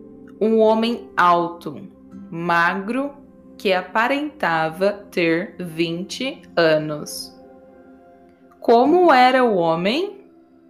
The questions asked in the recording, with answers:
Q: Como era o homem?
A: Ele era alto e magro que aparentava ter 20 anos.